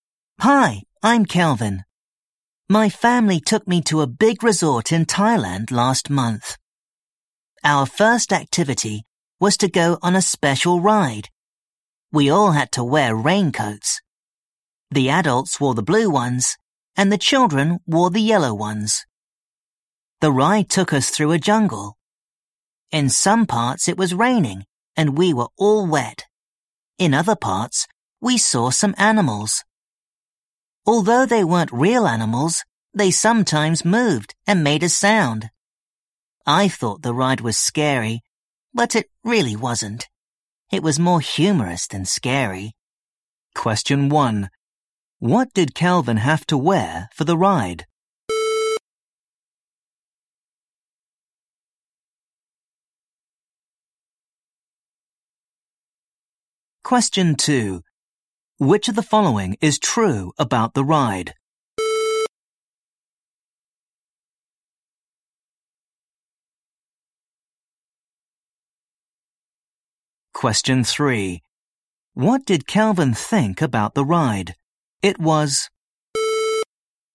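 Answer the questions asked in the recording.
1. A yellow raincoat
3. It was more humorous than scary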